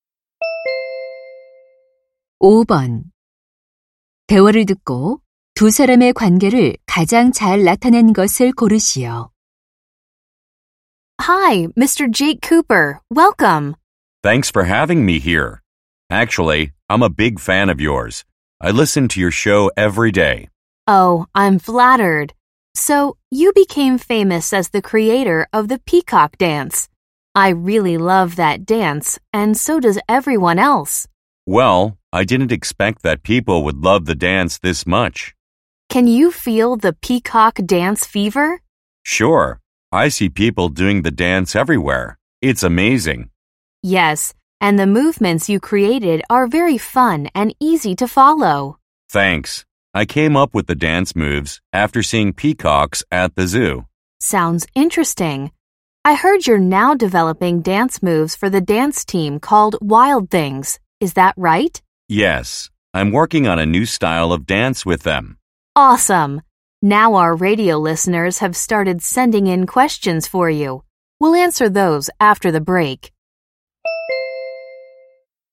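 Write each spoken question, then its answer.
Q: 대화를 듣고 두 사람의 관계를 가장 잘 나타낸 것을 고르시오.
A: 라디오 진행자 - 안무가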